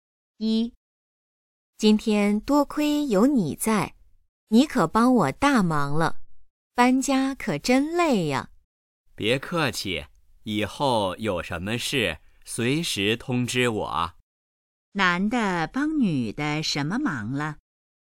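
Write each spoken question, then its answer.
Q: 男的帮女的什么忙了?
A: 帮她搬家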